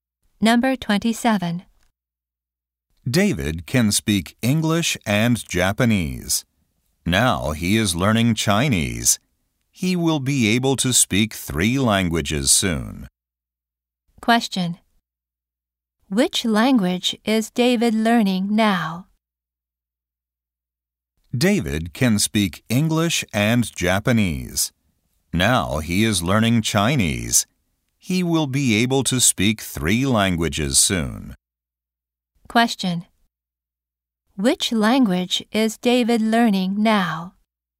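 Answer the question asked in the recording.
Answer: Chinese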